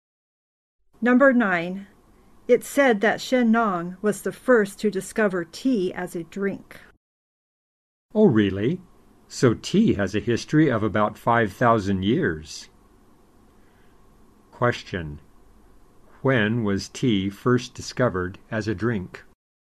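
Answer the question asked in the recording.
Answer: About 5,000 years ago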